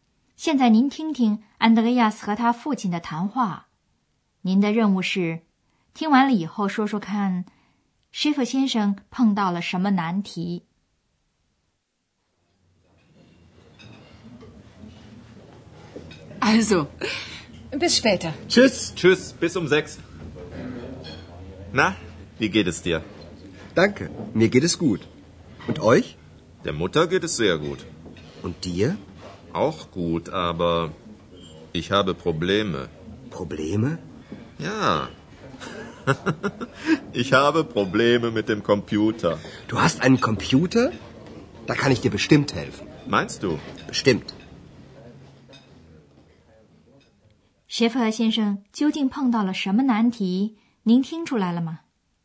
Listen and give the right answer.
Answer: 原来他有一台电脑,他的问题是出在电脑方面。